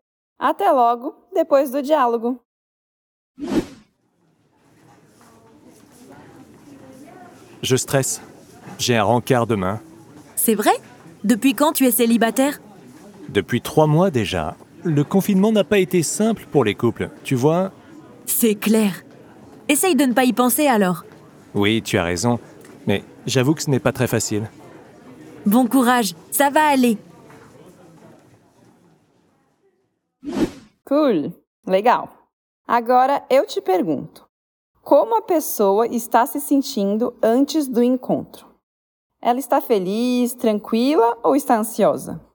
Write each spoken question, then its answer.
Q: Agora eu te pergunto: como a pessoa está se sentindo antes do encontro? Ela está feliz, tranquila ou está ansiosa?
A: Tenso, stressé.